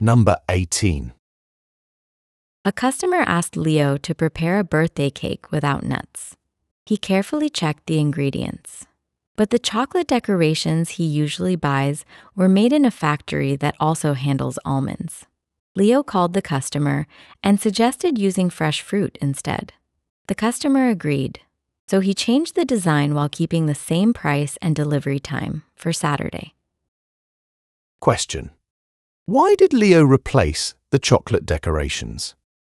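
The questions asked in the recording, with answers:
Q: why did Leo replace the chocolate decorations?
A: They were made in a factory that also handles almonds, and the cake had to be nut-free.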